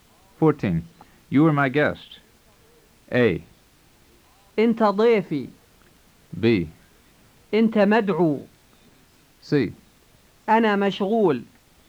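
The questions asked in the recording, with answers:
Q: You are my guest.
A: A: أنت ضيفي.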